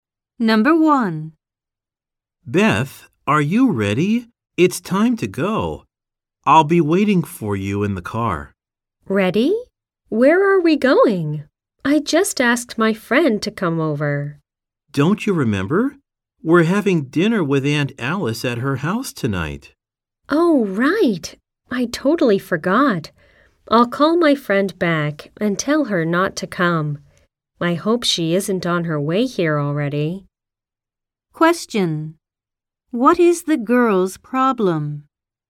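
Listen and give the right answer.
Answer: She forgot about dinner at Aunt Alice's after inviting a friend over.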